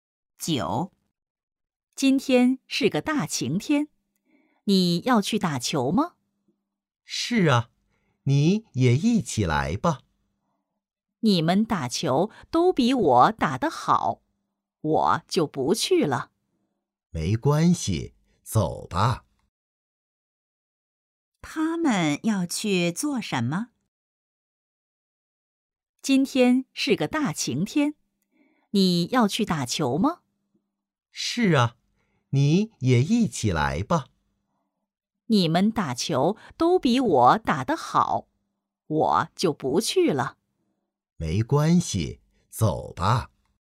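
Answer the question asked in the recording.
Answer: 打球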